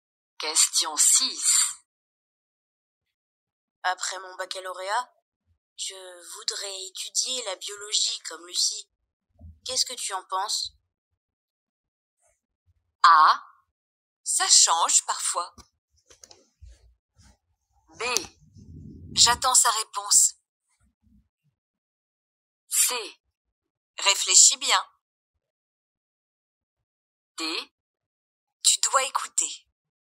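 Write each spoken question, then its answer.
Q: Qu'est-ce que tu en penses?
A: C: Réfléchis bien.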